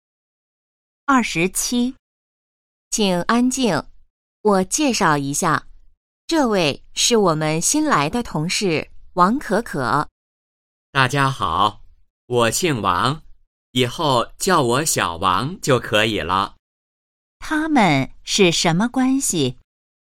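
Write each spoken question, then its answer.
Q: 他们是什么关系?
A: 同事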